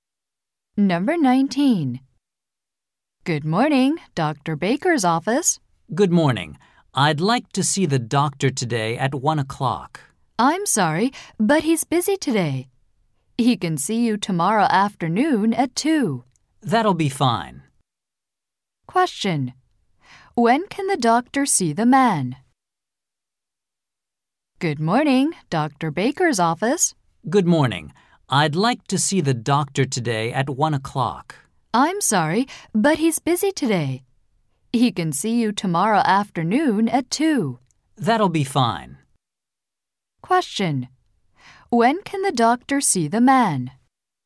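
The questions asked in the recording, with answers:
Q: When can the doctor see the man?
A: Tomorrow afternoon at 2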